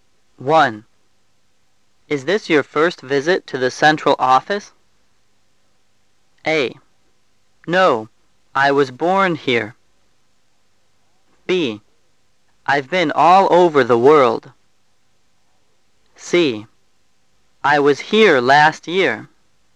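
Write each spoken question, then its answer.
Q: Is this your first visit to the central office?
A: C: I was here last year.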